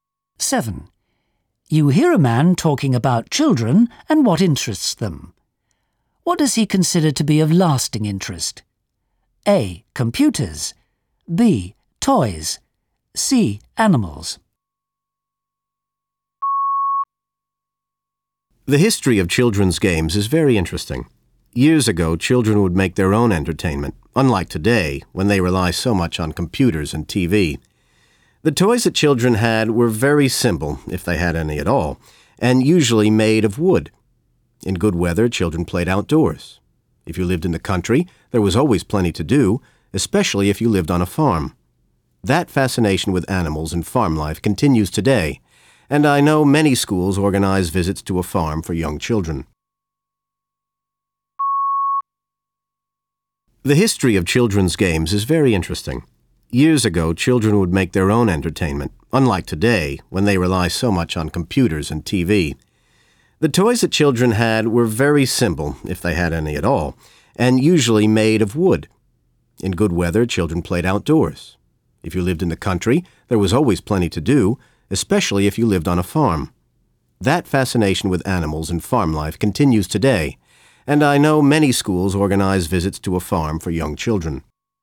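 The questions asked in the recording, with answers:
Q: What does he consider to be of lasting interest?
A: C: Animals.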